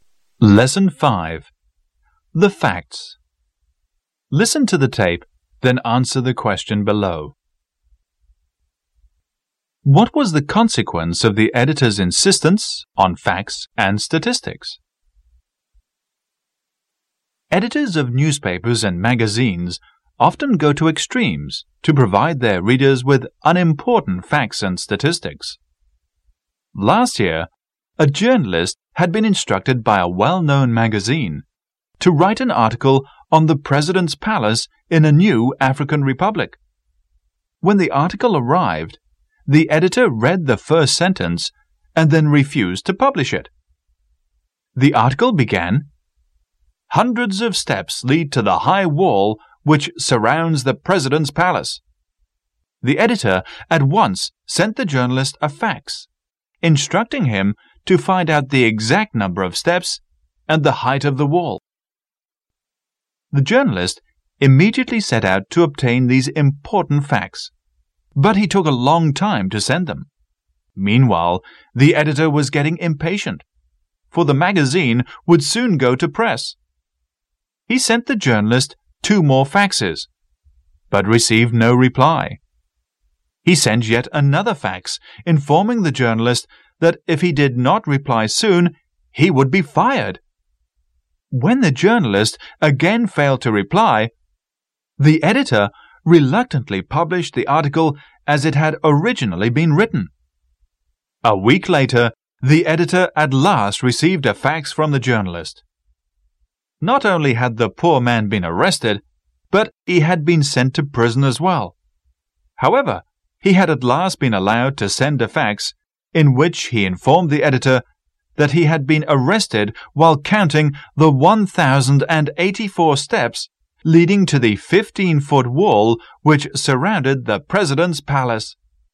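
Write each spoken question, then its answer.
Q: What was the consequence of the editor's insistence on facts and statistics?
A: The journalist was arrested and sent to prison while counting the steps, and the article was published as originally written.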